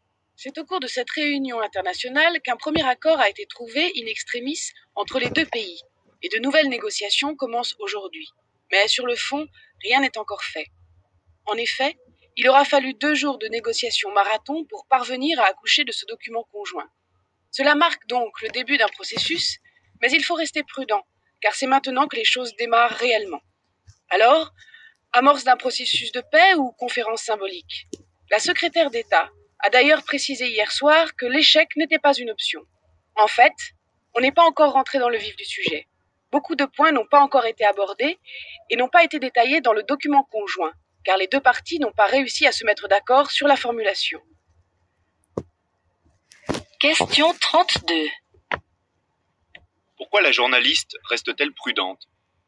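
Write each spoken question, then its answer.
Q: Pourquoi la journaliste reste-t-elle prudente?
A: Parce que rien n'est encore fait : ce n'est que le début du processus, les négociations sur le fond commencent seulement et beaucoup de points n'ont pas encore été abordés.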